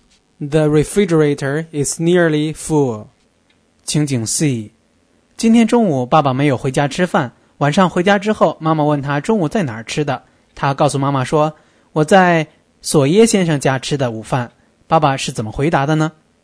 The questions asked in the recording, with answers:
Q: 爸爸是怎么回答的呢?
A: I had lunch at Mr. Sawyer's.